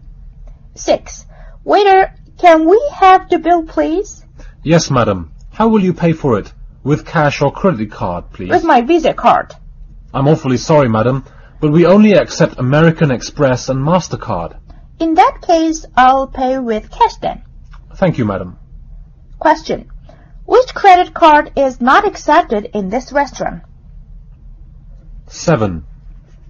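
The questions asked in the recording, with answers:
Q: Which credit card is not accepted in this restaurant?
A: Visa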